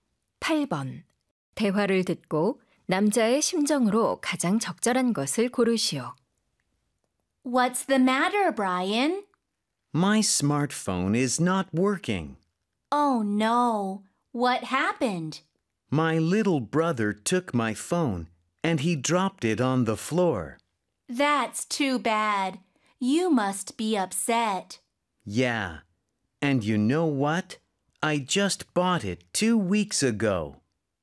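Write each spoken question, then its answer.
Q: 대화를 듣고 남자의 심정으로 가장 적절한 것을 고르시오.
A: 속상함 (upset)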